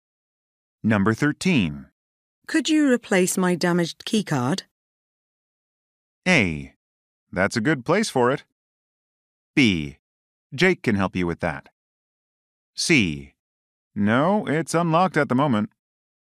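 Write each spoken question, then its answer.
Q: Could you replace my damaged keycard?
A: B: Jake can help you with that.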